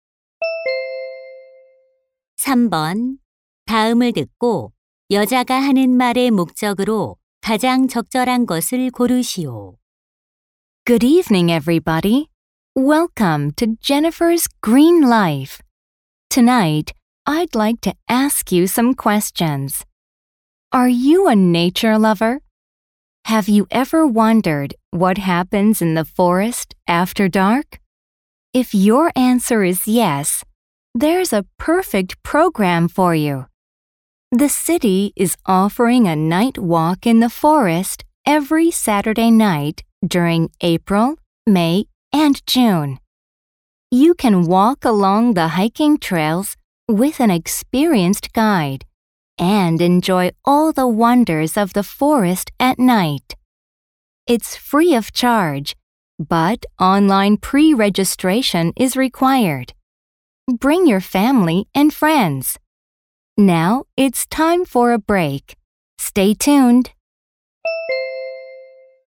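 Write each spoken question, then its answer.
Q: 다음을 듣고 여자가 하는 말의 목적으로 가장 적절한 것을 고르시오.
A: 야간 숲 걷기 프로그램을 홍보하려고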